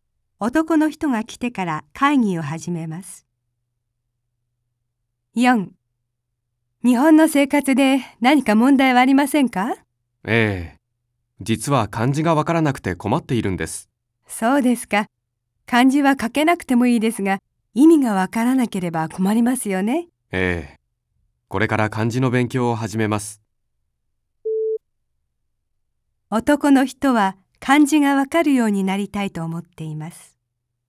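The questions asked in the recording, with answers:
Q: 男の人は漢字がわかるようになりたいと思っています。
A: ○(正しい)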